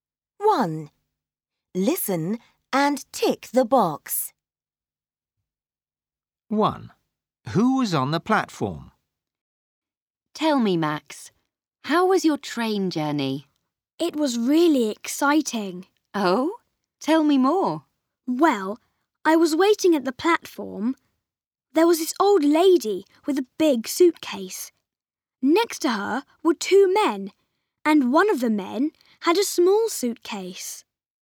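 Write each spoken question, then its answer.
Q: Who was on the platform?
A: An old lady with a big suitcase and two men, one with a small suitcase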